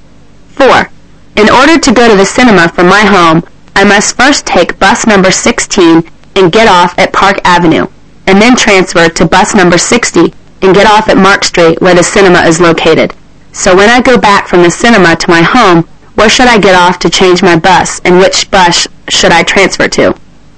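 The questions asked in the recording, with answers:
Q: So when I go back from the cinema to my home, where should I get off to change my bus, and which bus should I transfer to?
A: Get off at Park Avenue and transfer to bus number 16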